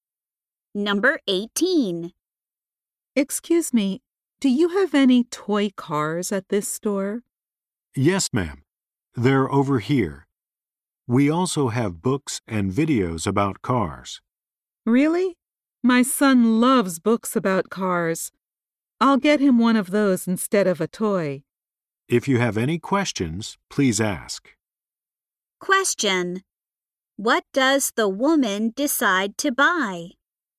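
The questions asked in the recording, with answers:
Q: what does the woman decide to buy?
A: A book about cars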